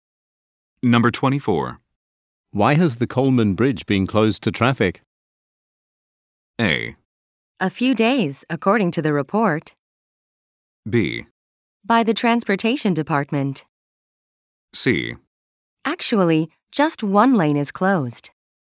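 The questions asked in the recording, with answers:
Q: Why has the Coleman Bridge been closed to traffic?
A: C: Actually, just one lane is closed.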